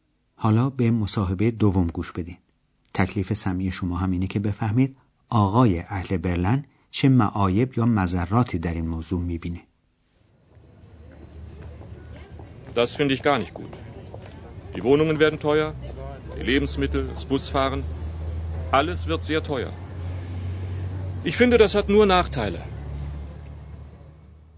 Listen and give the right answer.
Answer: پس به عقیده این آقا ضرر یا عیب این کار اینه که همه چیز خیلی گران میشه.